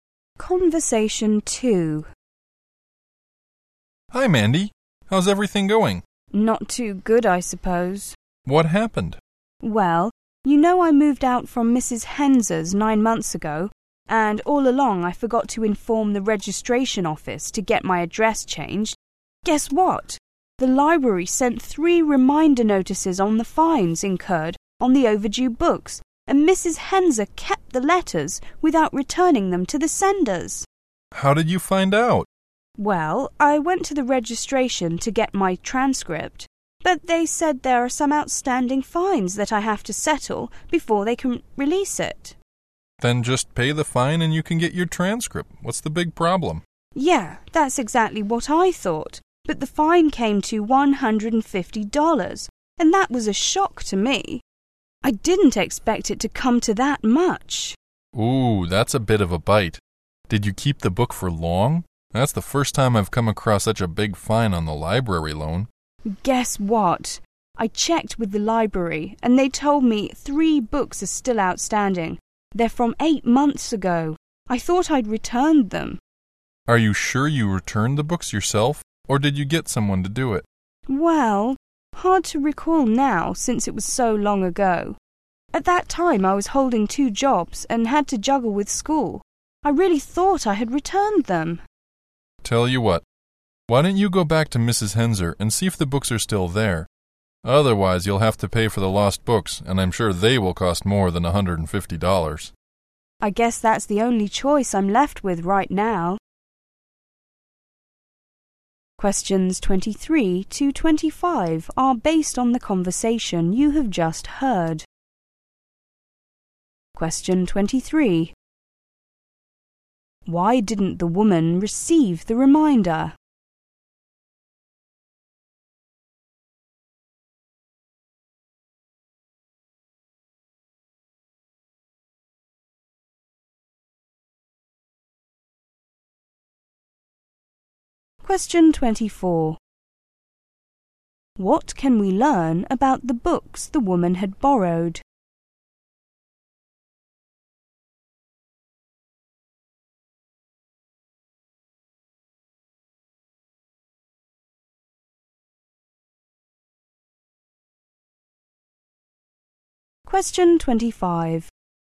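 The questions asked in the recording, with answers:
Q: Why didn't the woman receive the reminder?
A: She moved without changing her address, and Mrs. Henser kept the letters

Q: What can we learn about the books the woman had borrowed?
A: Three books are still outstanding from 8 months ago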